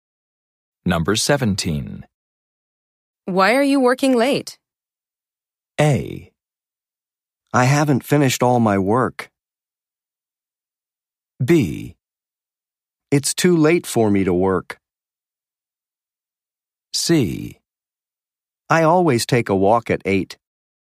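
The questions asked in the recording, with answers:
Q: Why are you working late?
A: A: I haven't finished all my work.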